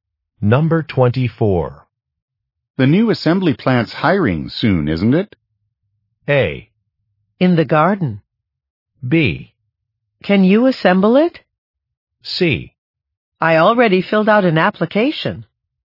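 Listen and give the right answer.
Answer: C: I already filled out an application.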